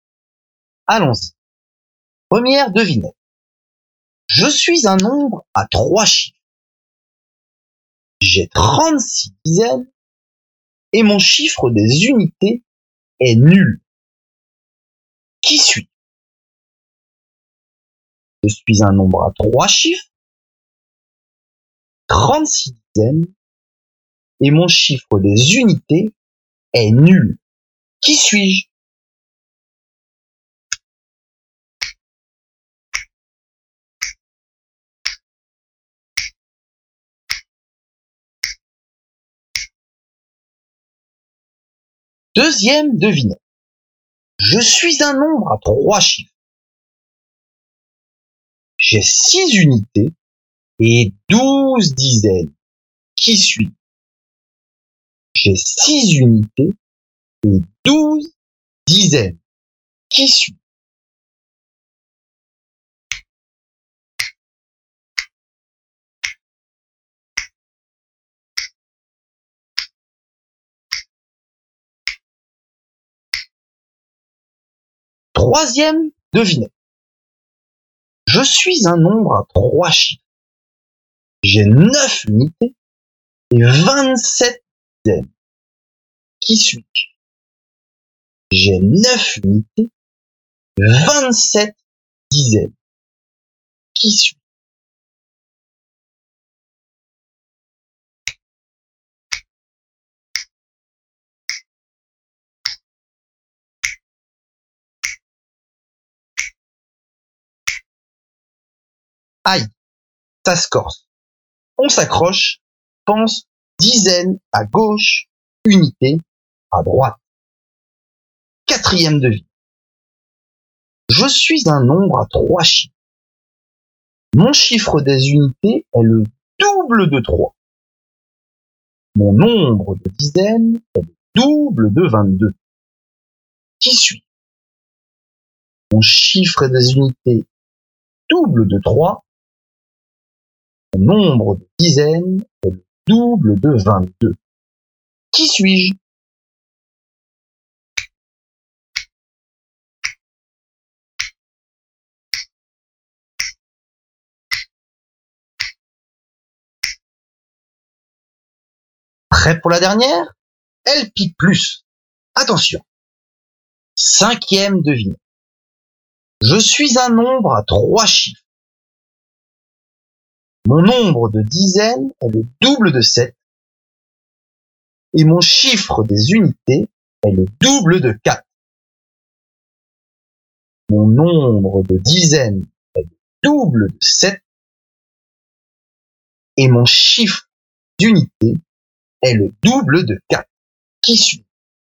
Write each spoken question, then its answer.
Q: J'ai 36 dizaines et mon chiffre des unités est nul.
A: 36 dizaines, 0 unités.

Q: J'ai 6 unités et 12 dizaines.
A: Pour la seconde devinette, le résultat est 12 dizaines 6 unités.

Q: J'ai 9 unités et 27 dizaines.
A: pour la troisième devinette, il fallait donner le nombre 27 dizaines et 9 unités.

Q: Mon chiffre des unités est le double de 3. Mon nombre de dizaines est le double de 22.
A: Ce nombre est donc 44 dizaines et 6 unités.

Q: Mon nombre de dizaines est le double de 7 et mon chiffre des unités est le double de 4.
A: Mon nombre mystère est 14 dizaines, 8 unités.